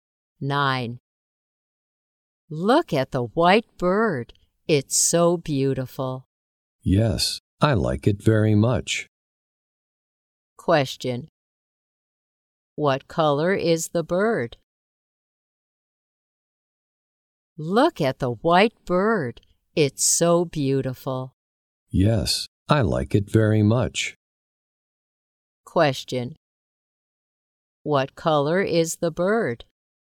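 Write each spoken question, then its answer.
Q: What color is the bird?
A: White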